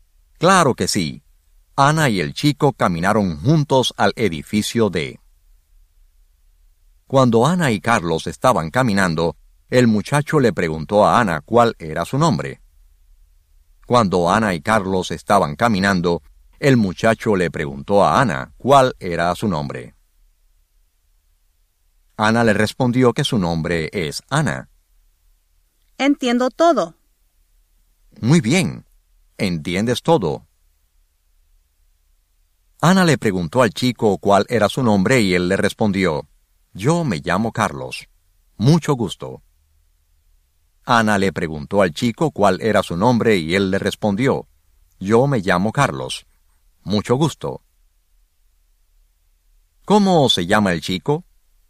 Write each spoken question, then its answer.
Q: ¿Cómo se llama el chico?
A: Carlos.